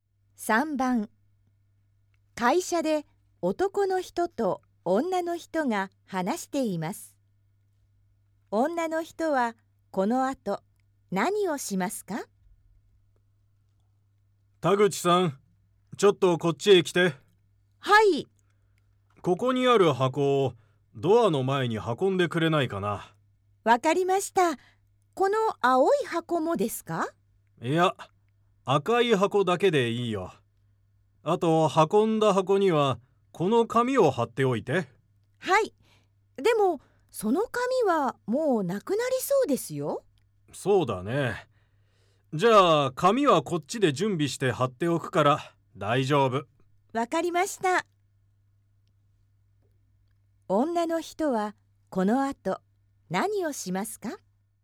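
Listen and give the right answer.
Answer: 赤い箱だけをドアの前に運ぶ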